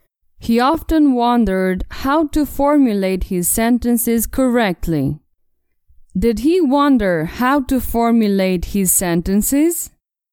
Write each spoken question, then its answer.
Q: Did he wonder how to formulate his sentences?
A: Yes, he wondered how to formulate his sentences.